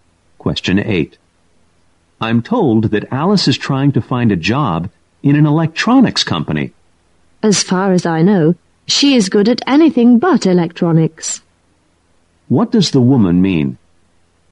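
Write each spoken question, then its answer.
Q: What does the woman mean?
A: Alice is not good at electronics.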